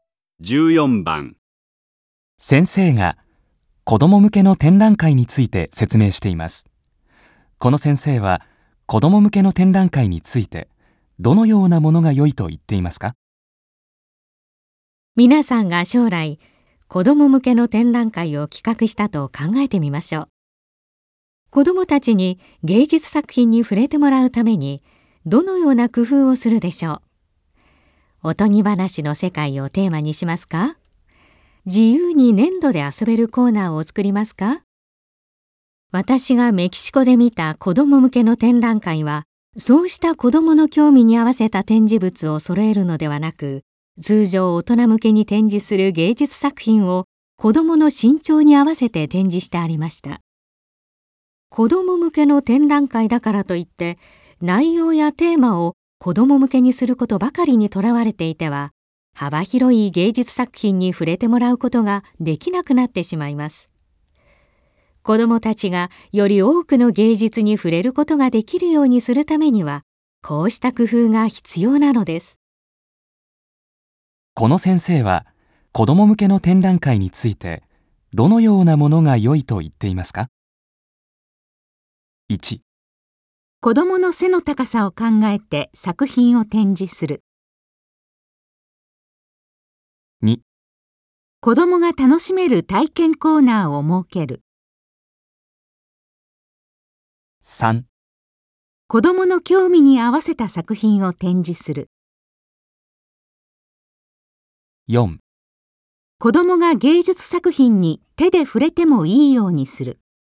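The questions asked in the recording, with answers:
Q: この先生は、子ども向けの展覧会について、どのようなものが良いと言っていますか?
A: 1: 子どもの背の高さを考えて作品を展示する。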